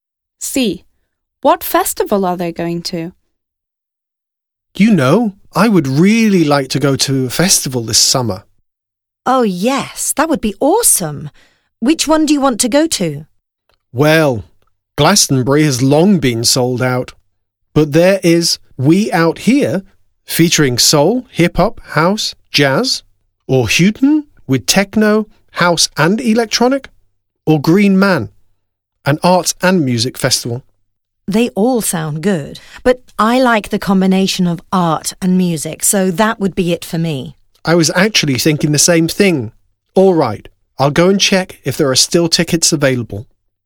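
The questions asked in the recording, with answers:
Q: What festival are they going to?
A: Green Man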